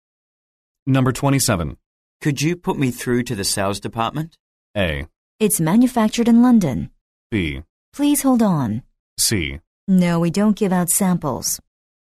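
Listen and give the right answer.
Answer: B: Please hold on.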